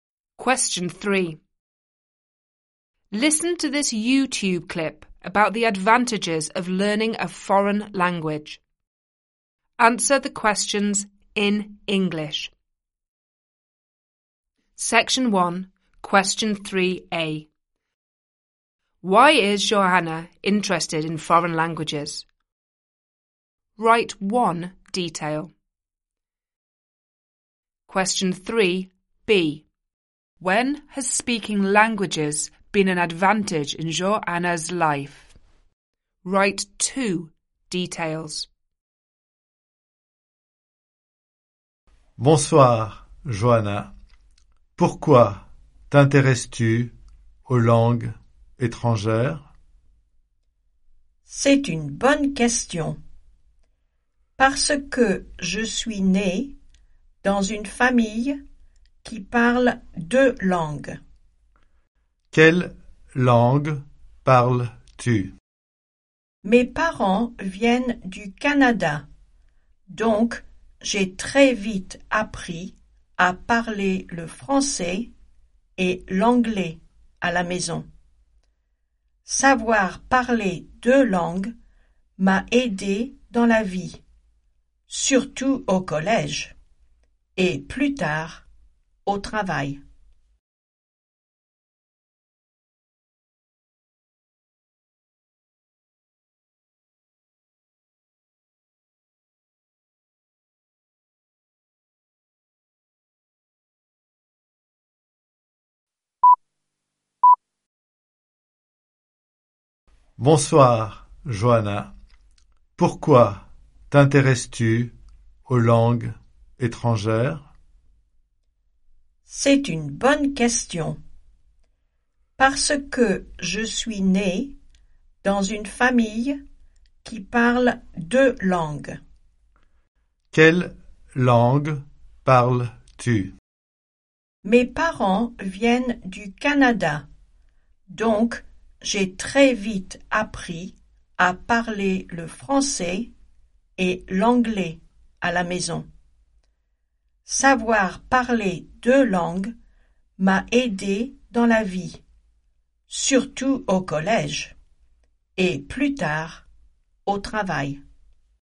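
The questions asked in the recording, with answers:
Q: Why is Johanna interested in foreign languages?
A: She was born into a family that speaks two languages

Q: When has speaking languages been an advantage in Johanna's life?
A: At school and later at work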